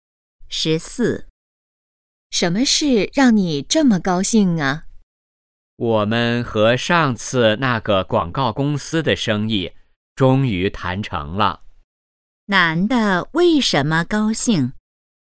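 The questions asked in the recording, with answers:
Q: 男的为什么高兴?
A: 和广告公司的生意谈成了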